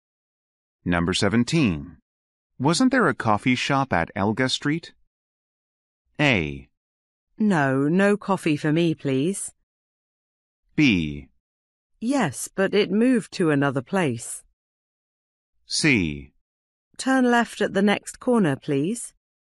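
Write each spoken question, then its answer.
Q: Wasn't there a coffee shop at Elga Street?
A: B: Yes, but it moved to another place.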